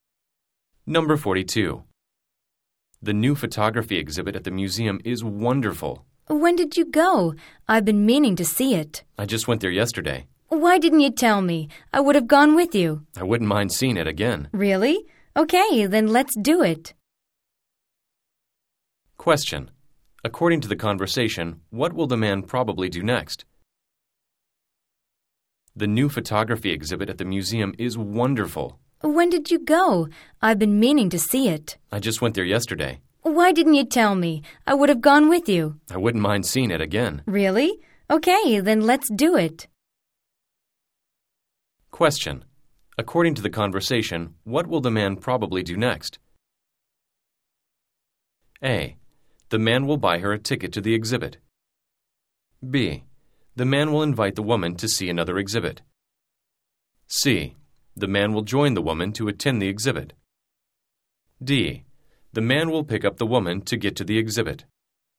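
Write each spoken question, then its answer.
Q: According to the conversation, what will the man probably do next?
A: C: The man will join the woman to attend the exhibit.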